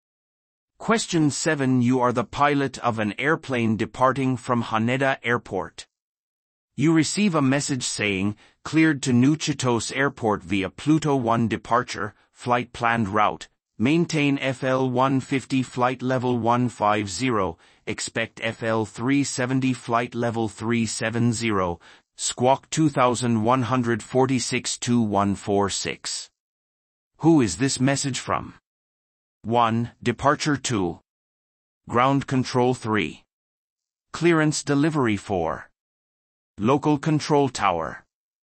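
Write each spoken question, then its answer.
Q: Who is this message from?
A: 3: Clearance delivery.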